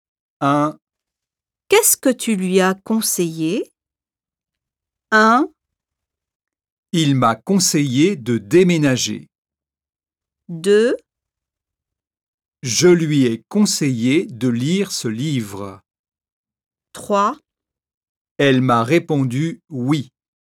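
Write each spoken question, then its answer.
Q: Qu'est-ce que tu lui as conseillé?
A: 2: Je lui ai conseillé de lire ce livre.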